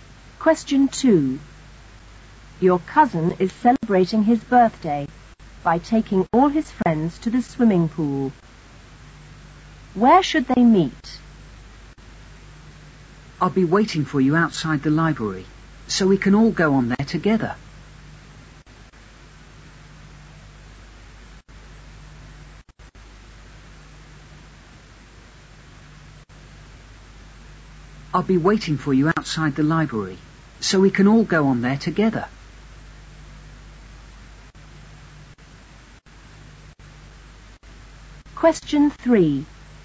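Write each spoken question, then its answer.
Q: Where should they meet?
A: Outside the library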